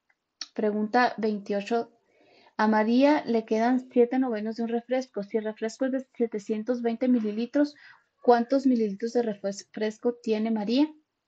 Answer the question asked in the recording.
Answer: Y la respuesta correcta es la A, 560.